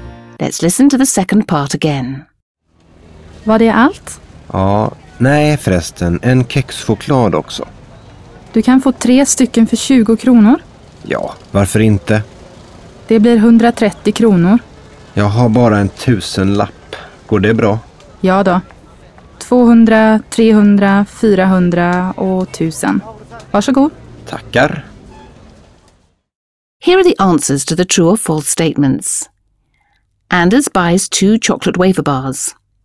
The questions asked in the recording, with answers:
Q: Anders buys 2 chocolate wafer bars.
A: False. Anders intends to buy only 1 chocolate wafer, but because of the offer in the kiosk, he buys 3, not 2.